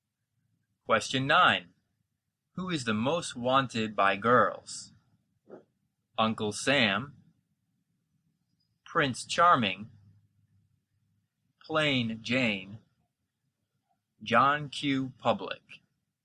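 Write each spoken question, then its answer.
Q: Who is the most wanted by girls?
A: B: Prince Charming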